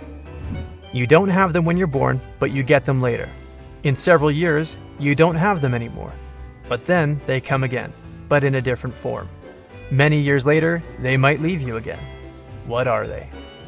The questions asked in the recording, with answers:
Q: What are they?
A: They are your teeth.